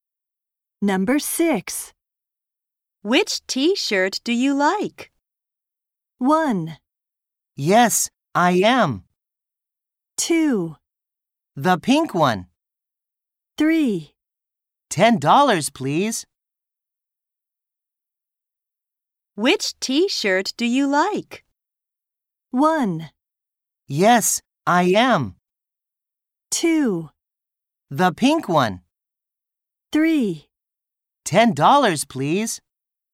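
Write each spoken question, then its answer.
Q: Which t-shirt do you like?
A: 2: The pink one.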